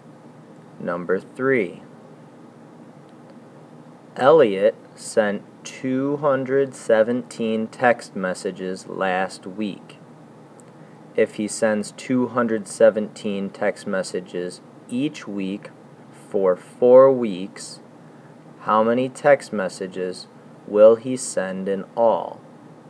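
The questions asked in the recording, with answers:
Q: If he sends 217 text messages each week for 4 weeks, how many text messages will he send in all?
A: 868 text messages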